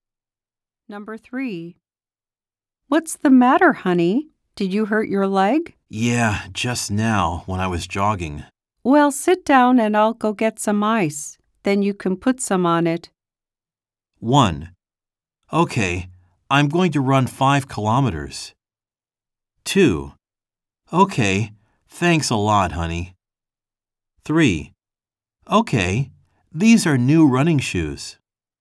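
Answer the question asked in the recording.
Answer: 2: Okay, thanks a lot, honey.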